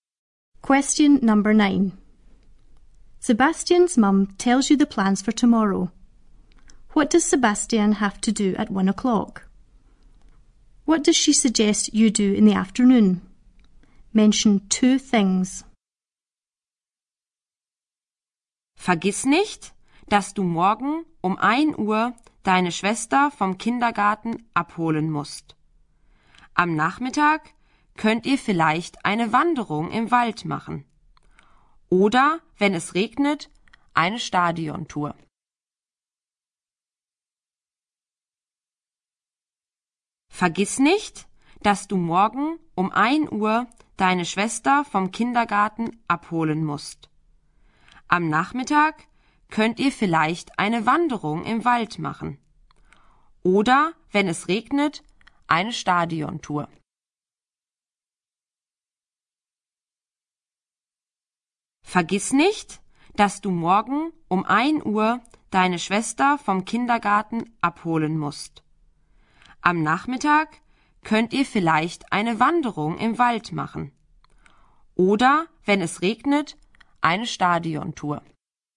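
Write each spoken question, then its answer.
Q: What does Sebastian have to do at 1 o'clock?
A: Pick up his sister from the nursery

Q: What does she suggest you do in the afternoon?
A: Go for a walk/hike in the forest; or, if it rains, a stadium tour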